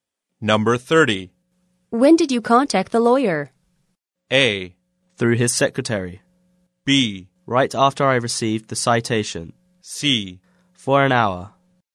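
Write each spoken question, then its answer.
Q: When did you contact the lawyer?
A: B: Right after I received the citation.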